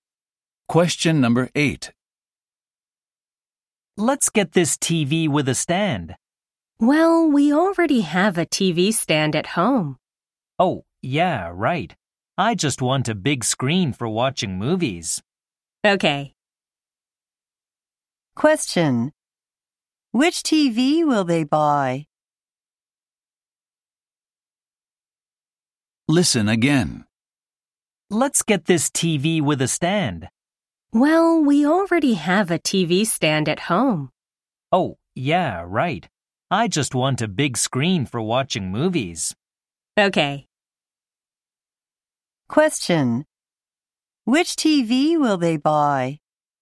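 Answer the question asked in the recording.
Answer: A big-screen TV without a stand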